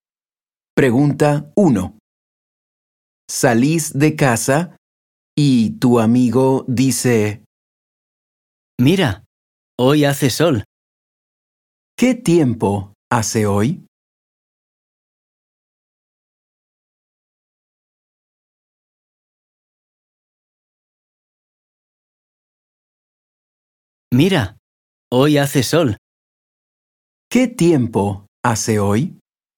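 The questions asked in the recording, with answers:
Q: ¿Qué tiempo hace hoy?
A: Hace sol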